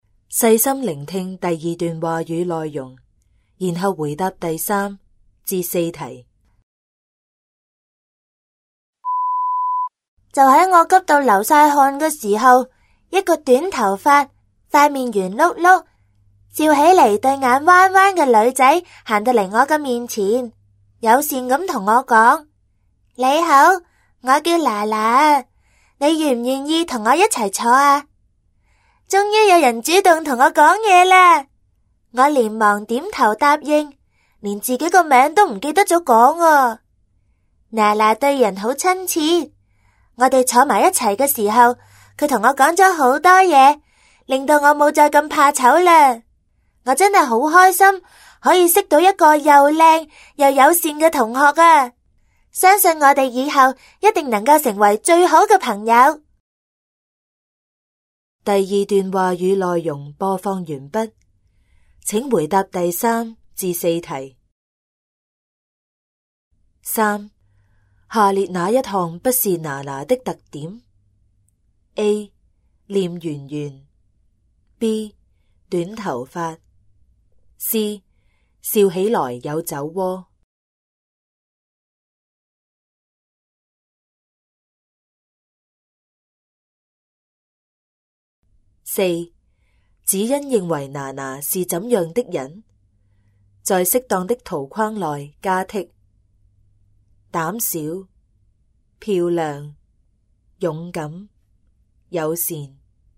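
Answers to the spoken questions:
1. C: 笑起来有酒窝
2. 漂亮、友善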